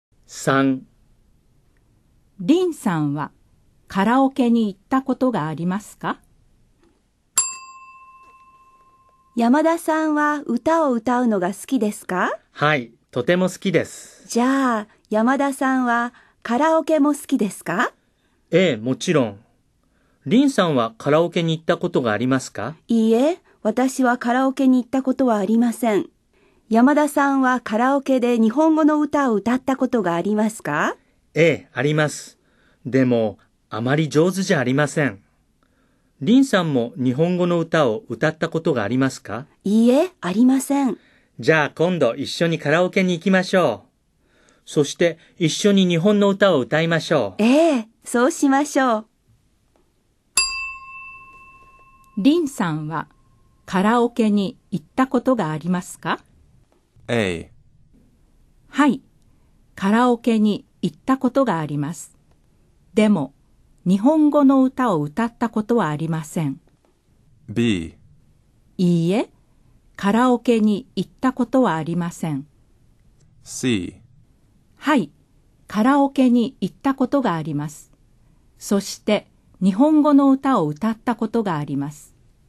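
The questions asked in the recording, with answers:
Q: リンさんはカラオケに行ったことがありますか?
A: B: いいえ、カラオケに行ったことはありません。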